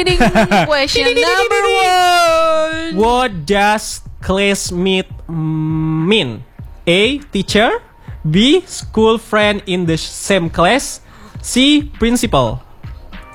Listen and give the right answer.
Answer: That's right. Classmate is the school friend in the same class.